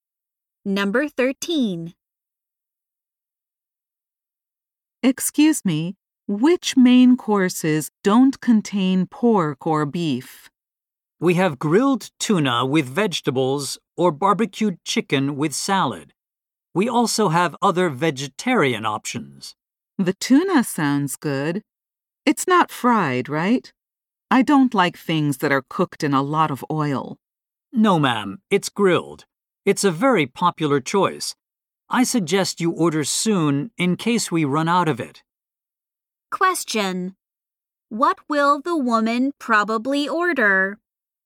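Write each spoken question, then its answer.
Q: What will the woman probably order?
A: The grilled tuna with vegetables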